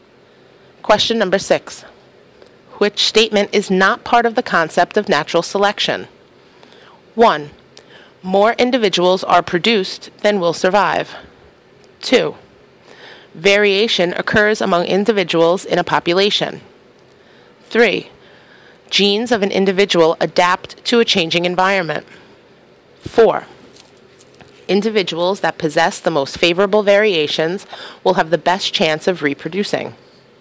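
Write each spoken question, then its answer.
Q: Which statement is not part of the concept of natural selection?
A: 3: Genes of an individual adapt to a changing environment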